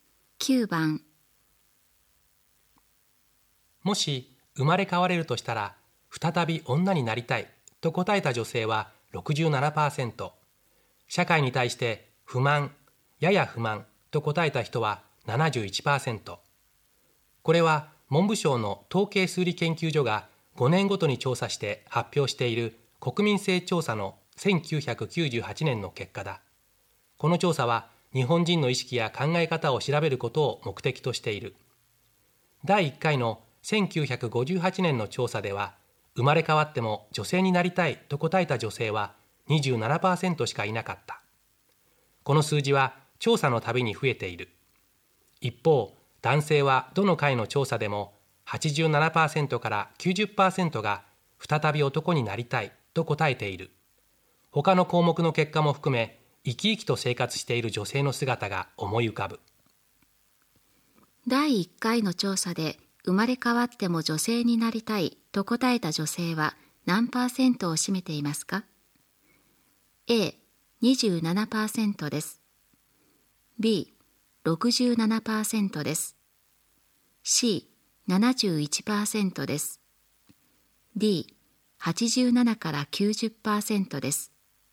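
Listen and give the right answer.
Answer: A: 27%です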